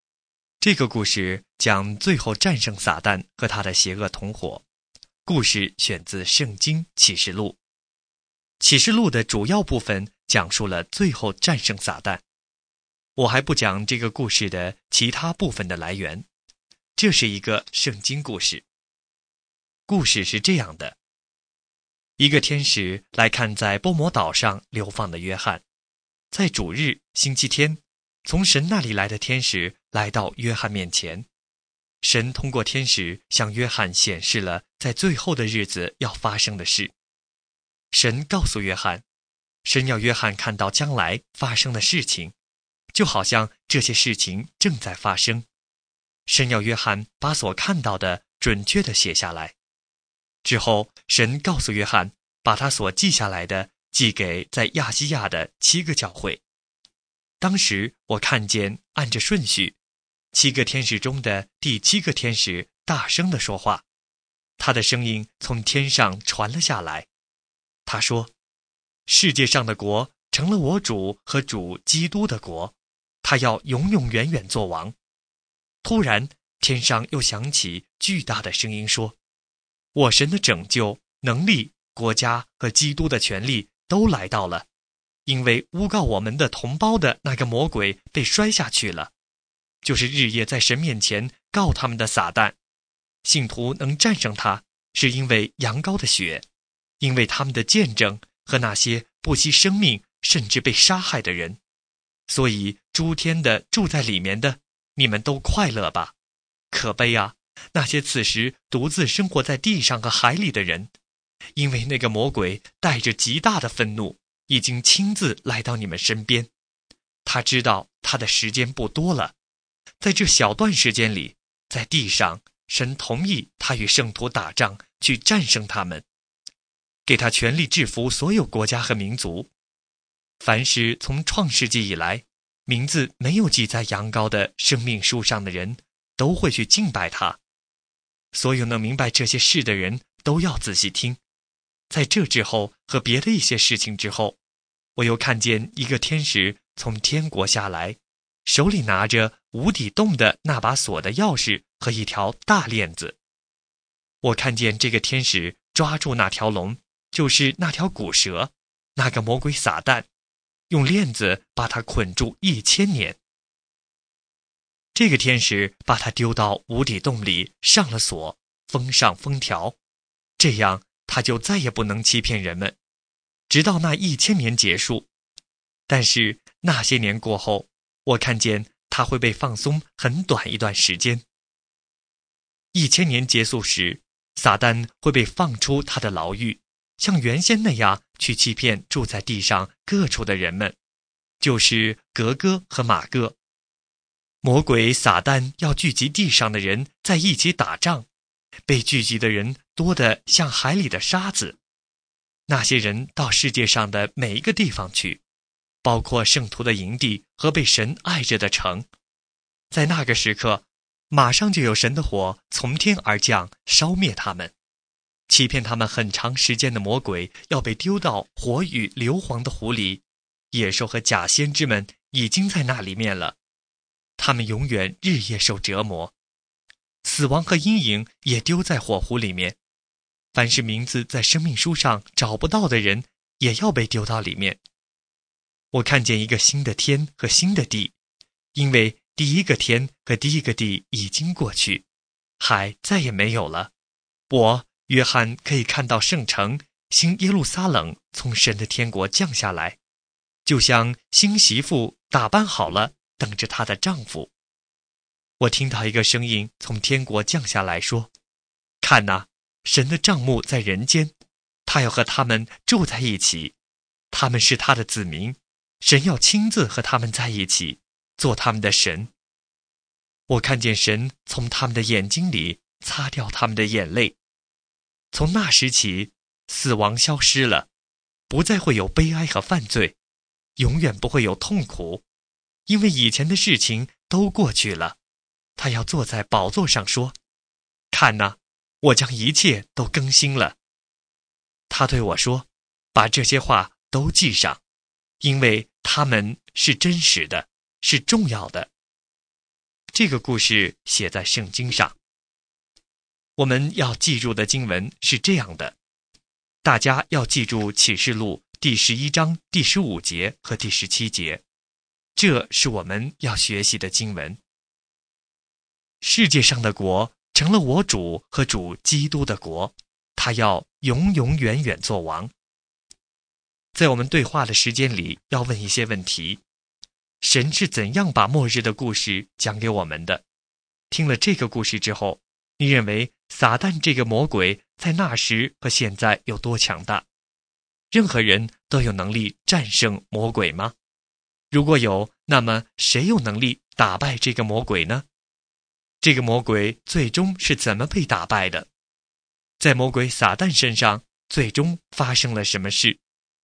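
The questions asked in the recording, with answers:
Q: 神是怎样把末日的故事讲给我们的?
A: 神通过天使向在波摩岛上的约翰显示,让他写下来寄给亚细亚的七个教会

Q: 在魔鬼撒旦身上最终发生了什么事?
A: 他被丢到火与硫磺的湖里,永远日夜受折磨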